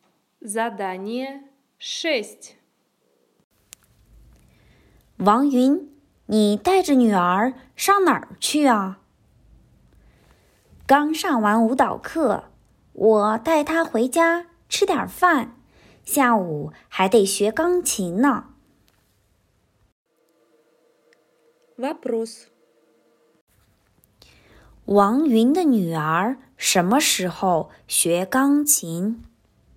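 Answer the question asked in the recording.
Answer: 下午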